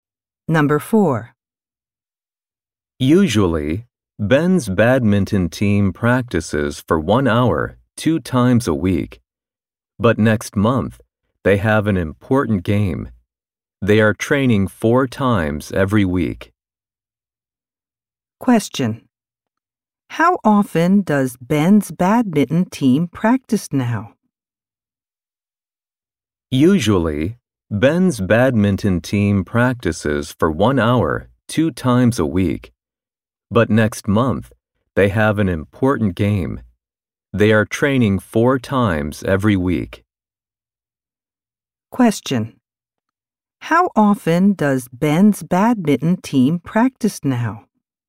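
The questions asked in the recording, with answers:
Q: How often does Ben's badminton team practice now?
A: Four times a week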